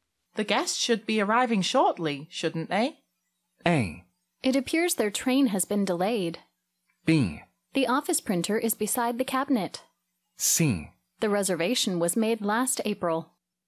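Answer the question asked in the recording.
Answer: A: It appears their train has been delayed.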